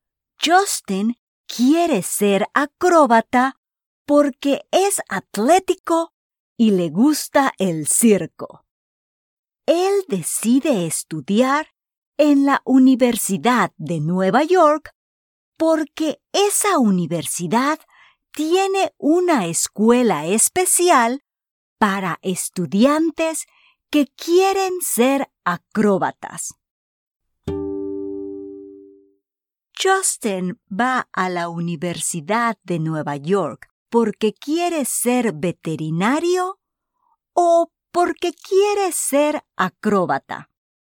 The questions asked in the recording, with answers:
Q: Justin va a la Universidad de Nueva York porque quiere ser veterinario o porque quiere ser acróbata.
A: Excelente. Justin va a la Universidad de Nueva York porque ahora quiere ser acróbata.